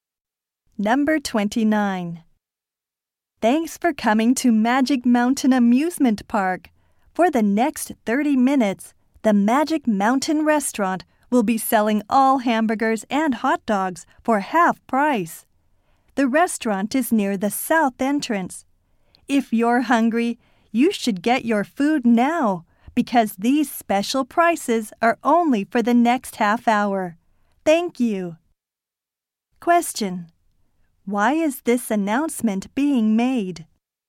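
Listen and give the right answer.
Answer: To announce half-price hamburgers and hot dogs at the restaurant.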